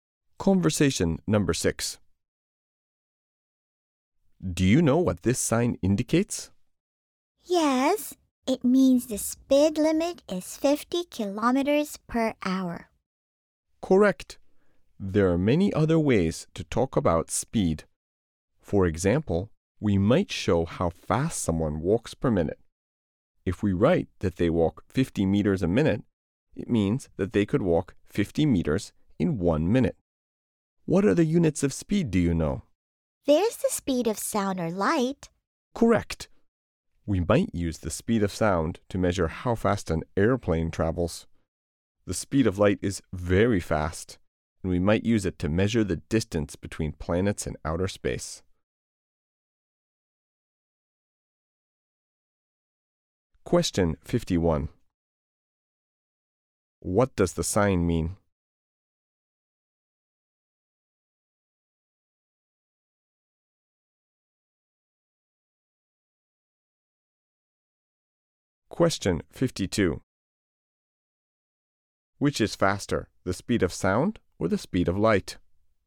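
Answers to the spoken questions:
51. The speed limit is 50 kilometers per hour.
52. The speed of light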